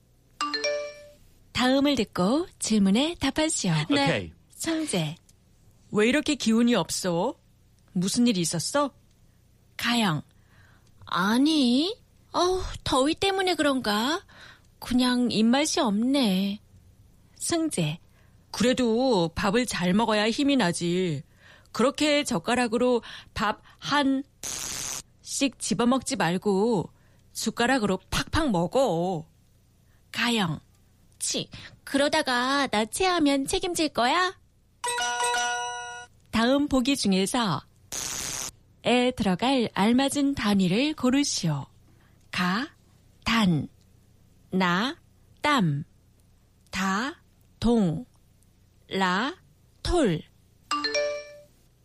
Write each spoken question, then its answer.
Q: 다음 보기 중에서 에 들어갈 알맞은 단위를 고르시오.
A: The correct answer was... La.